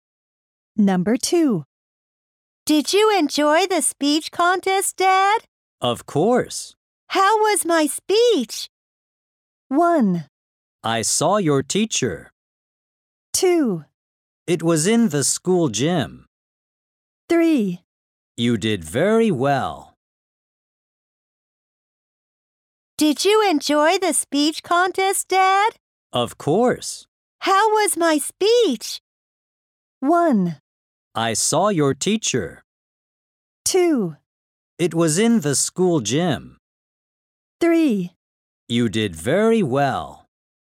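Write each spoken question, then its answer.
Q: How was my speech?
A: 3: You did very well.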